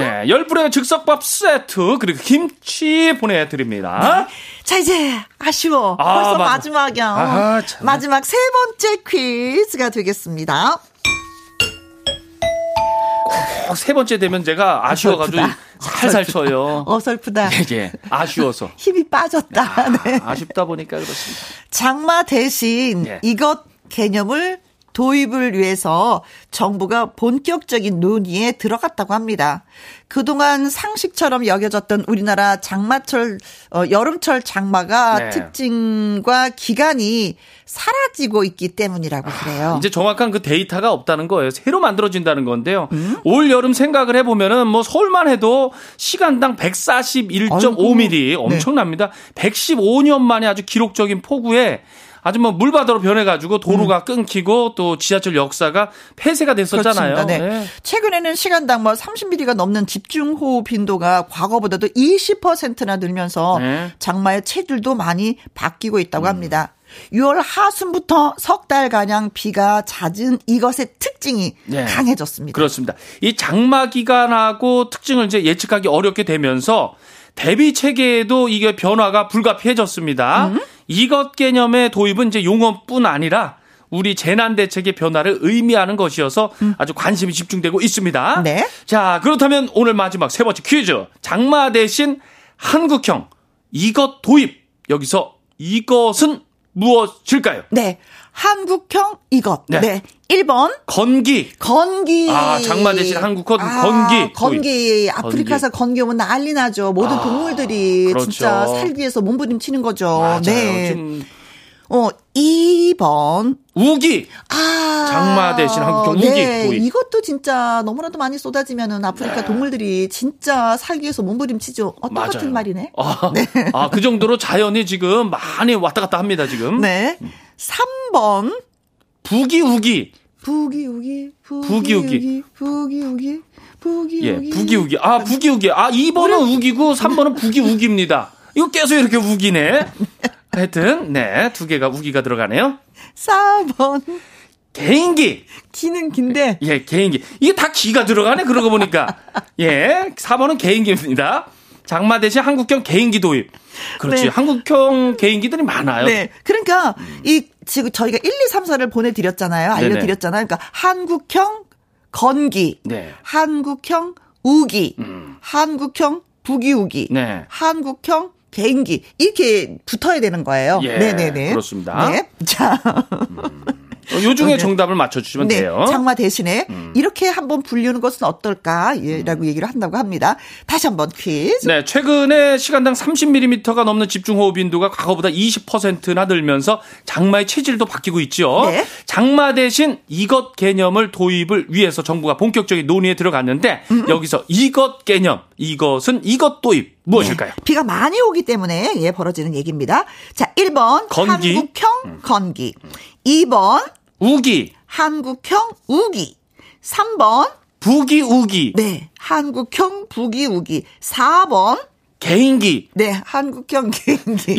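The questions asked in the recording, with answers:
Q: 장마 대신 한국형 이것 도입. 여기서 이것은 무엇일까요?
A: 2: 우기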